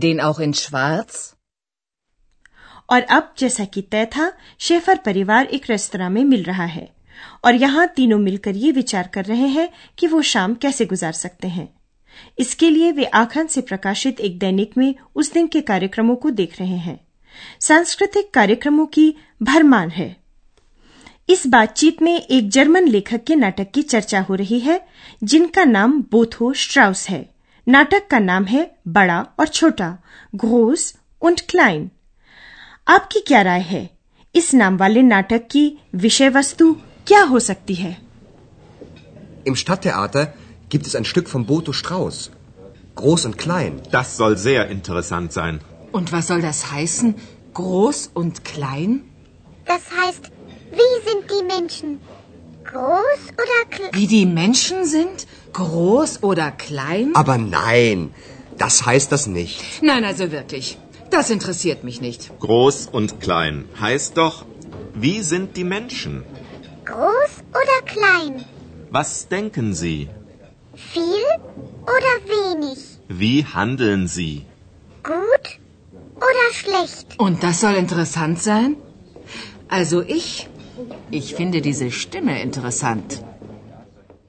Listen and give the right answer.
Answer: बड़ा और छोटा लोगों के चरित्र की ओर संकेत करता है लोग कैसे हैं वे क्या सोचते हैं और क्या करते हैं